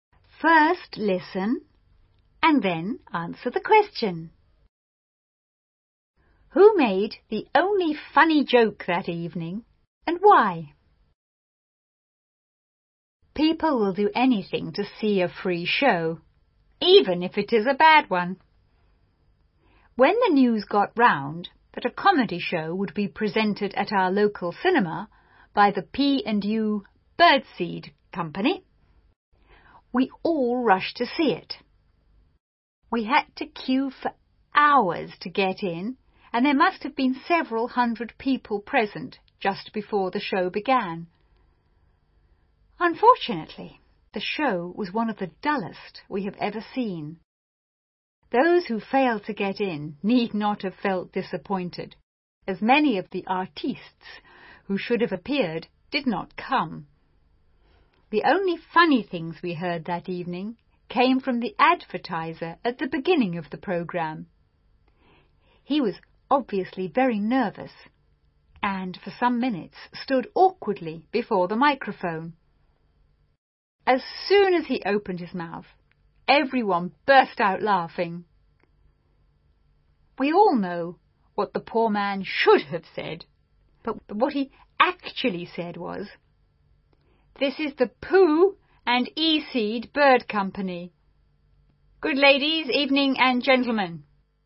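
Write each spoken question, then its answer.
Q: Who made the only funny joke that evening and why?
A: The advertiser (announcer) at the start of the programme, because he was nervous and mixed up his words.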